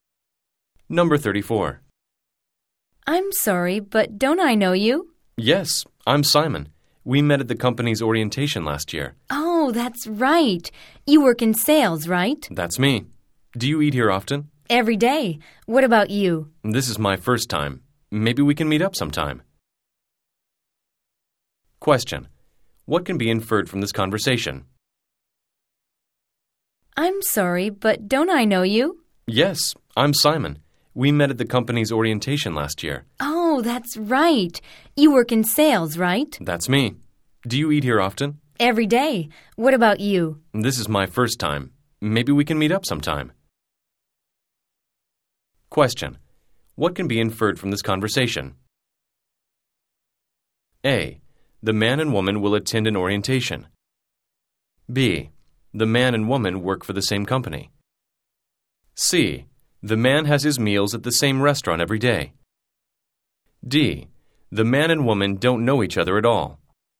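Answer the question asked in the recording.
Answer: B: The man and woman work for the same company.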